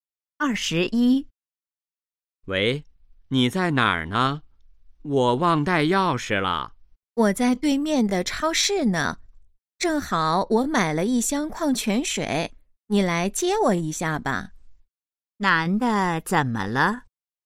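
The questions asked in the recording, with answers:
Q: 男的怎么了?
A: 忘带钥匙了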